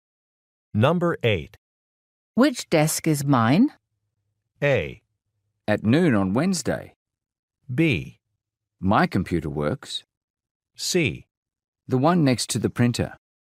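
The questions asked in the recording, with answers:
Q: Which desk is mine?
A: C: The one next to the printer.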